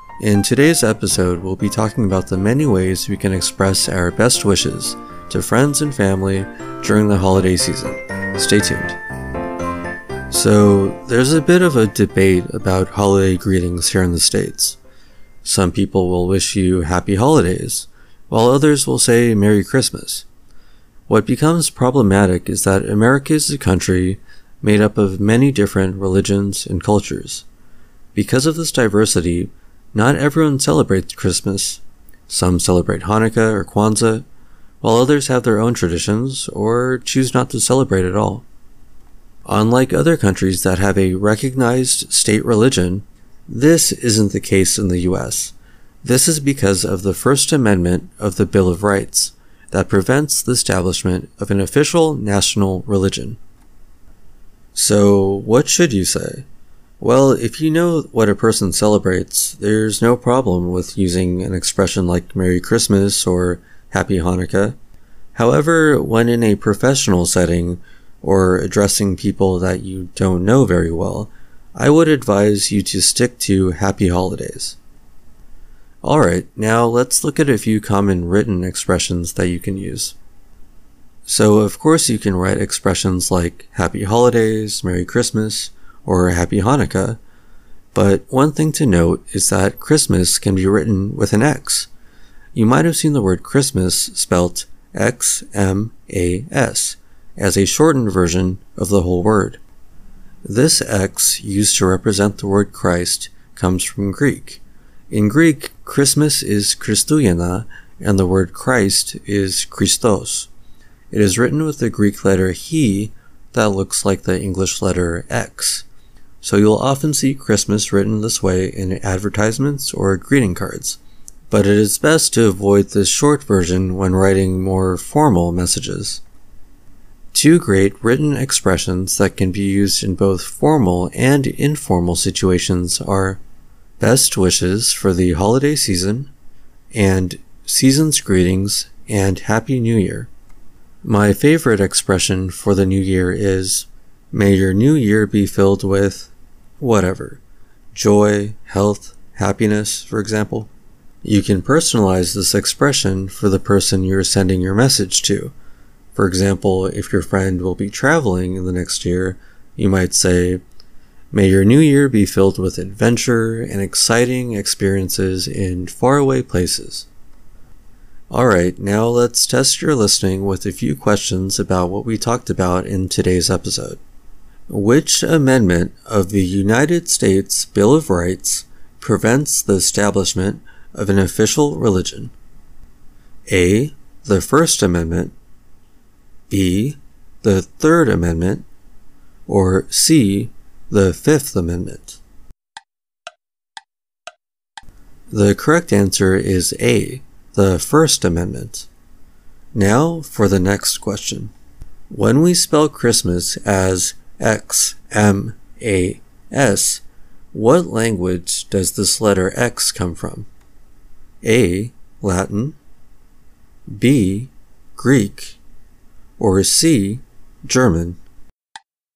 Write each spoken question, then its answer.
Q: Which amendment of the United States Bill of Rights prevents the establishment of an official religion?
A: The correct answer is A. The First Amendment.

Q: When we spell Christmas as X-M-A-S, what language does this letter X come from?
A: The correct answer is B. Greek.